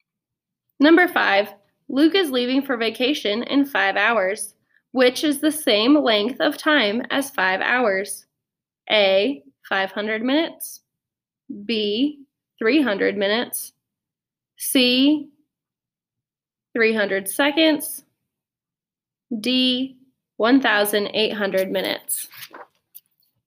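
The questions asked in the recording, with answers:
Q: Luke is leaving for vacation in 5 hours, which is the same length of time as 5 hours.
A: B: 300 minutes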